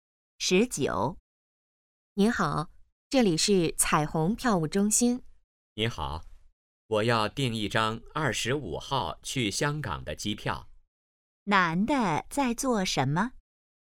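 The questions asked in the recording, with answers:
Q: 男的在做什么?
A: 订机票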